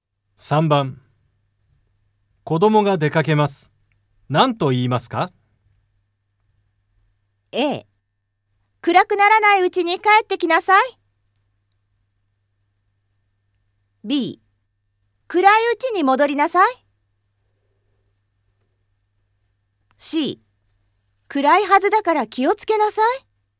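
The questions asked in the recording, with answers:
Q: 子供が出かけます。何と言いますか?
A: A: 暗くならないうちに帰ってきなさい。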